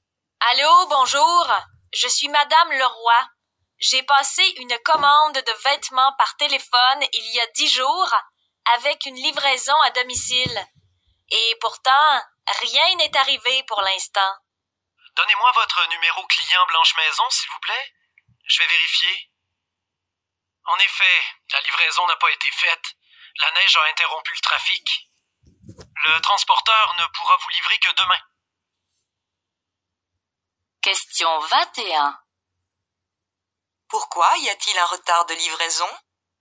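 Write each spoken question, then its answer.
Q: Pourquoi y a-t-il un retard de livraison ?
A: À cause de la neige, qui a interrompu le trafic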